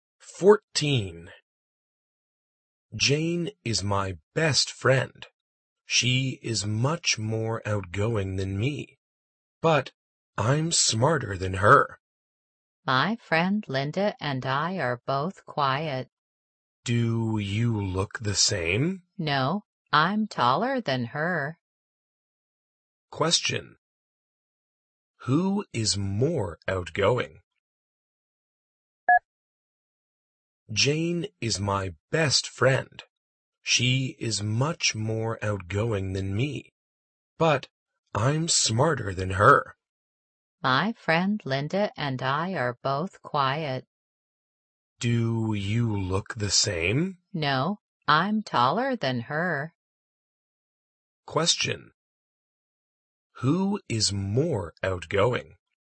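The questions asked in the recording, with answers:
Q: Who is more outgoing?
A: Jane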